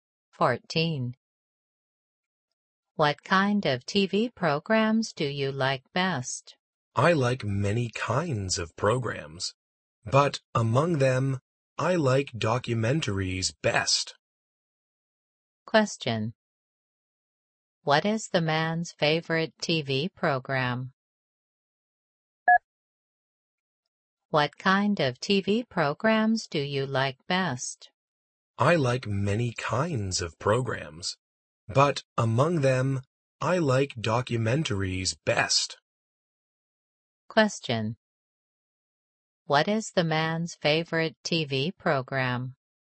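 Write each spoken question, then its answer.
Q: What is the man's favorite TV program?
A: Documentaries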